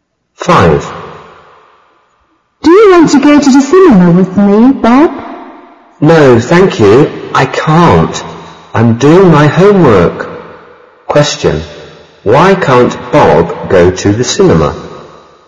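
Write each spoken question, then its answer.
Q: Why can't Bob go to the cinema?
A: He is doing his homework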